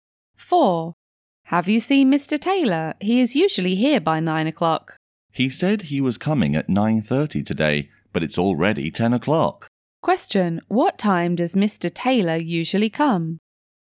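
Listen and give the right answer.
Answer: By 9 o'clock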